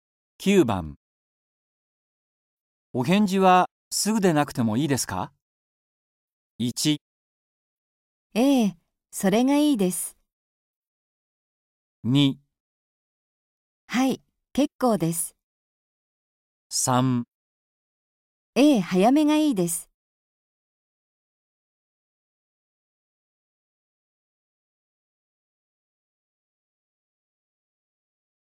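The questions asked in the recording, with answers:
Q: お返事はすぐでなくてもいいですか?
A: 2: はい、結構です。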